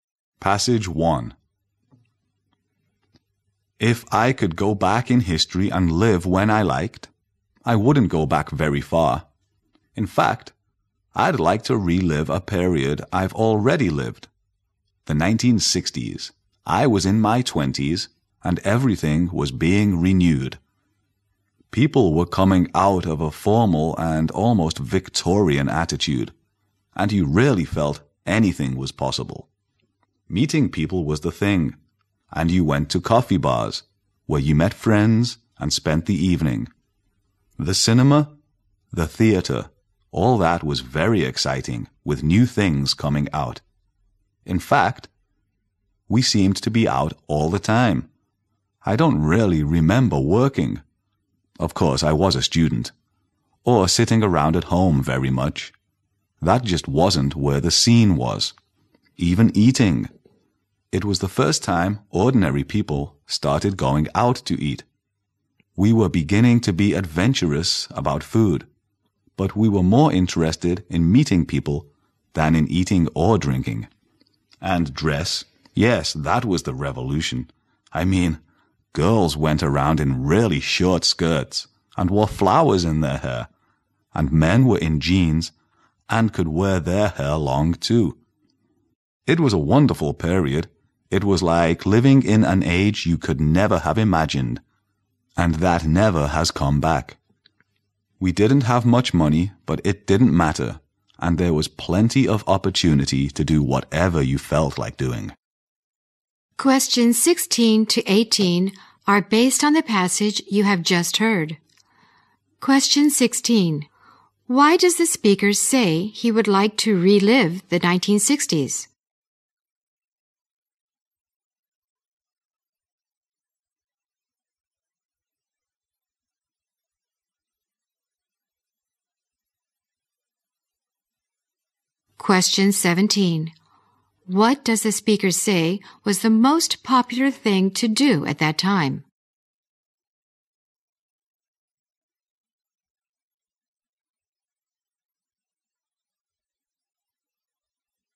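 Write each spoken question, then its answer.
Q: Why does the speaker say he would like to relive the 1960s?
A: Everything was being renewed and anything seemed possible

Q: What does the speaker say was the most popular thing to do at that time?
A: Meeting people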